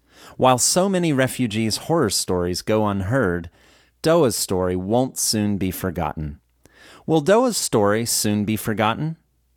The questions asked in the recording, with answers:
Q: Will Doa's story soon be forgotten?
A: No, Doa's story will not soon be forgotten.